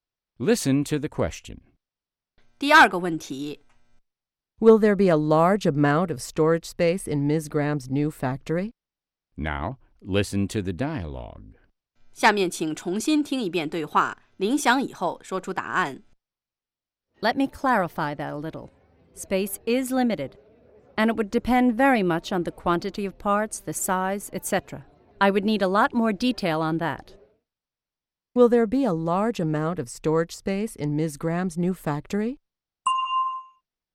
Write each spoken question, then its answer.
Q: Will there be a large amount of storage space in Ms. Graham's new factory?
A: No, there won't be. As Ms. Graham says, space is limited.